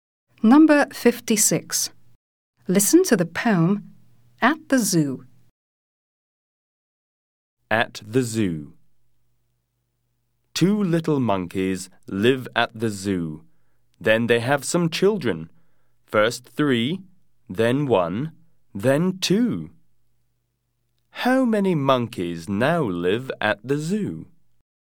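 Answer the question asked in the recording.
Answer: eight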